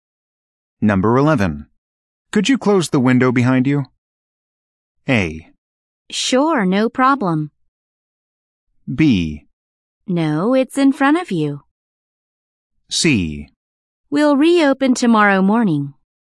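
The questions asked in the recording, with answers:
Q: Could you close the window behind you?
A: A: Sure, no problem.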